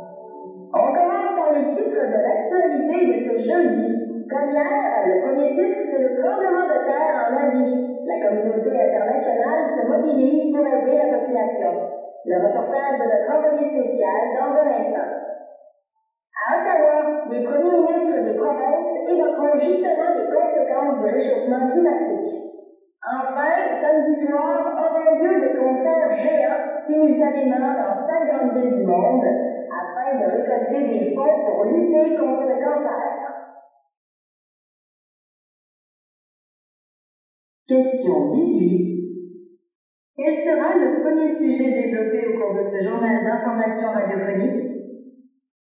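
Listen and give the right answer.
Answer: Le tremblement de terre en Asie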